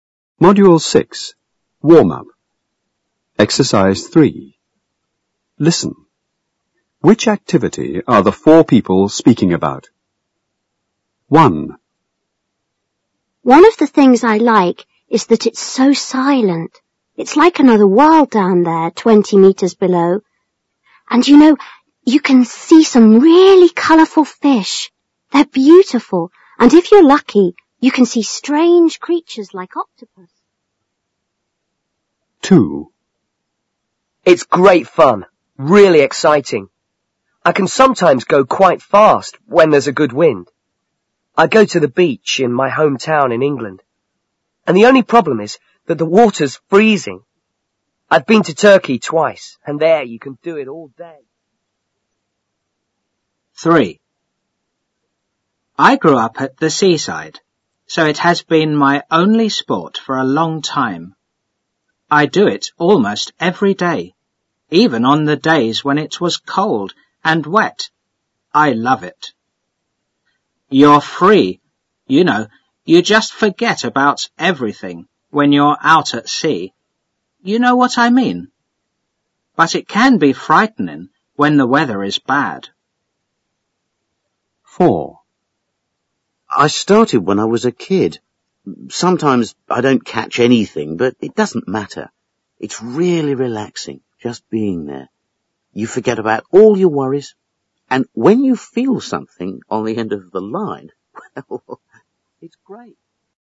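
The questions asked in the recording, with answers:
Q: Which activity are the four people speaking about?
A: diving

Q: Which activity are the four people speaking about?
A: fishing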